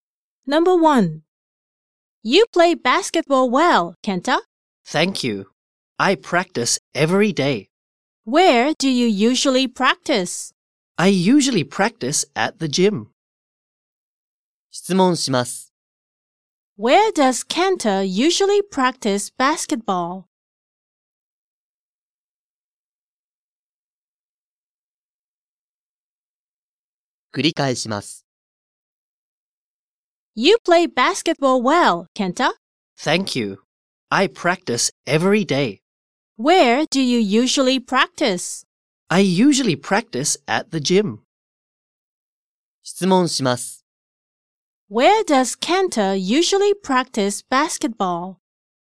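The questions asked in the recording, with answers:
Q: Where does Kenta usually practice basketball?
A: at the gym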